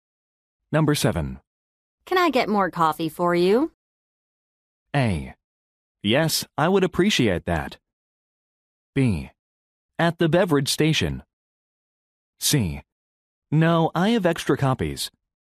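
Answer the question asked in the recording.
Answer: A: Yes, I would appreciate that.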